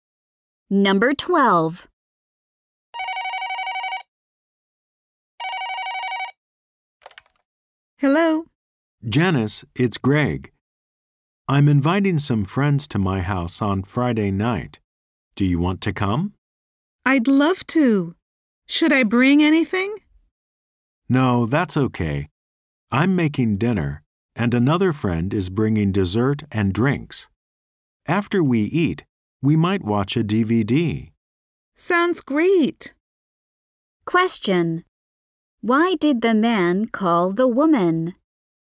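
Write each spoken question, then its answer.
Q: Why did the man call the woman?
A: To invite her to his house on Friday night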